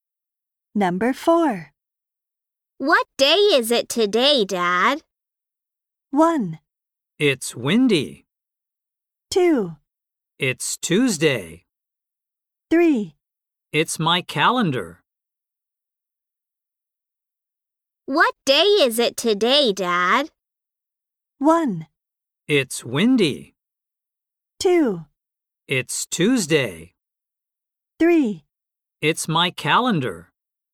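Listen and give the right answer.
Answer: 2: It's Tuesday.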